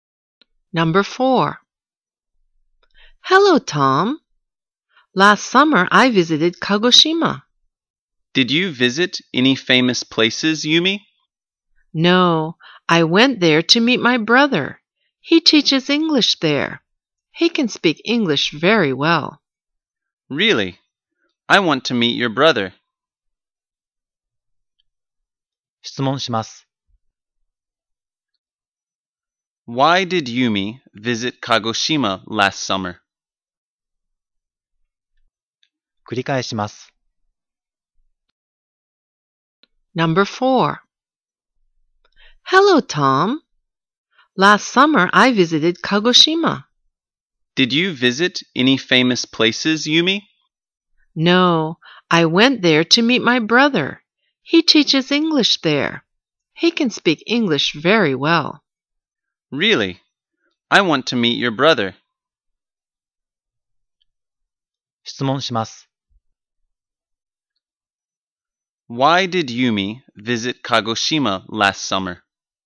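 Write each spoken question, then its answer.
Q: Why did Yumi visit Kagoshima last summer?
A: To meet her brother.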